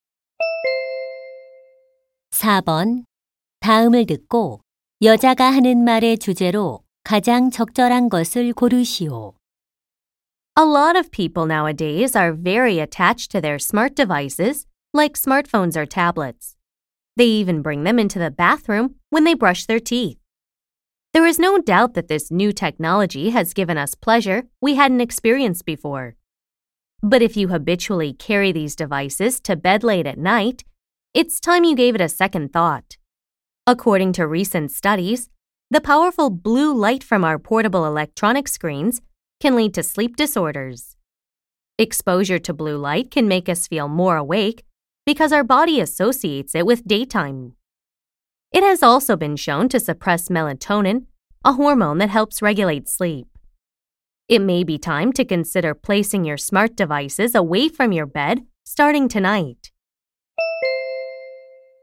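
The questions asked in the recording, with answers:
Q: 다음을 듣고 여자가 하는 말의 주제로 가장 적절한 것을 고르시오.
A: 스마트 기기의 블루라이트가 수면에 미치는 악영향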